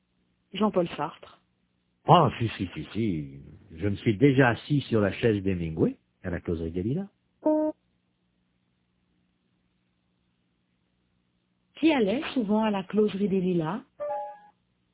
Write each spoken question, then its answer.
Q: Qui allait souvent à la Causerie des Lilas?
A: Hemingway.